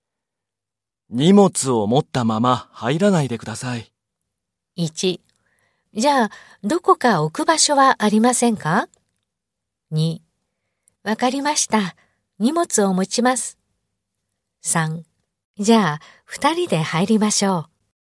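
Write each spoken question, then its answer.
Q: 荷物を持ったまま入らないでください。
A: 2: じゃあ、どこか置く場所はありませんか?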